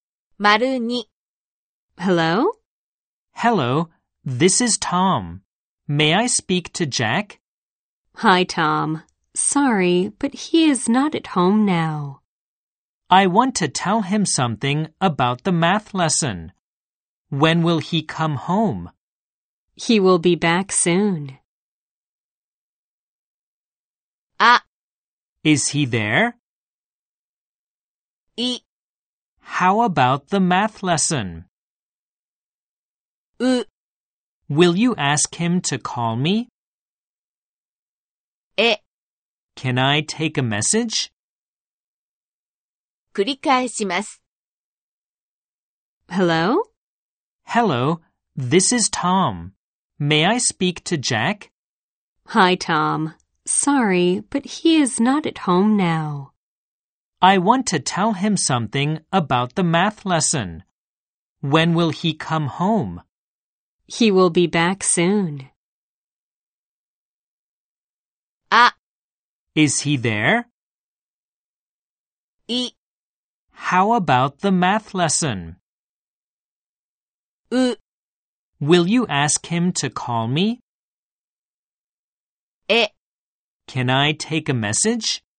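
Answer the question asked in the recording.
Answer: う: Will you ask him to call me?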